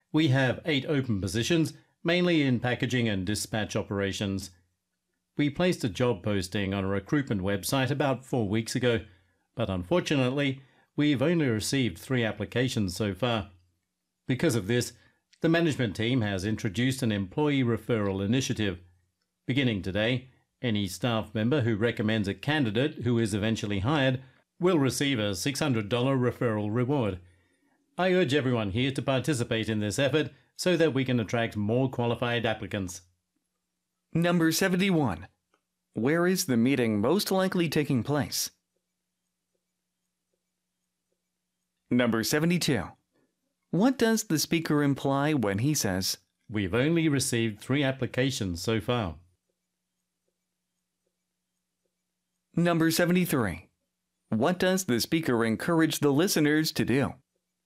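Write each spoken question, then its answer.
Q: Where is the meeting most likely taking place?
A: 이건 Logistics Company, 물류회사가 하는 일이죠.

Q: What does the speaker imply when he says, "We've only received 3 applications so far"?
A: Not enough people have applied for the jobs

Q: What does the speaker encourage the listeners to do?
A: Recommend candidates through the employee referral program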